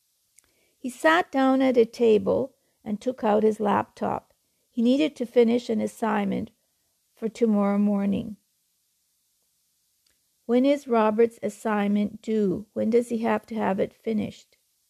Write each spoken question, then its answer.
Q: When is Robert's assignment due?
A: He needs to have it finished by tomorrow morning.